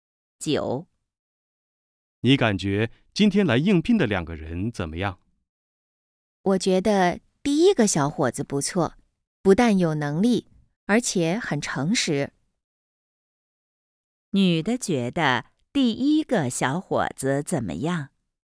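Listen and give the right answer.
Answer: 有能力,很诚实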